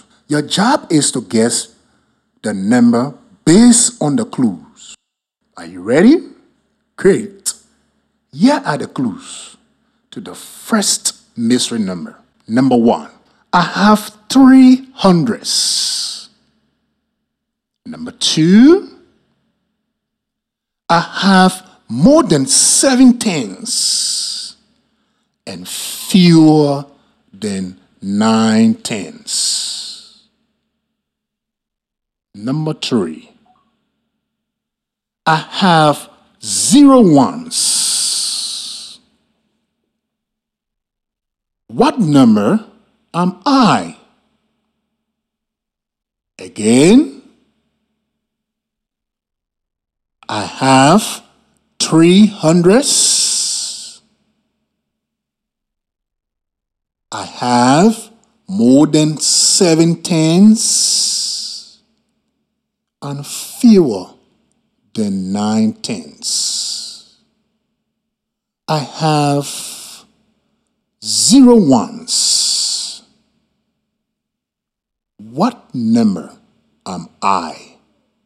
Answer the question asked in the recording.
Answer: The mystery number is 380.